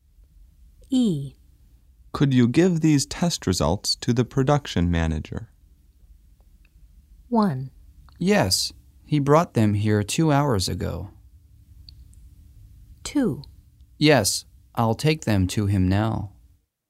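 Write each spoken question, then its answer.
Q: Could you give these test results to the production manager?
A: 2: Yes, I'll take them to him now.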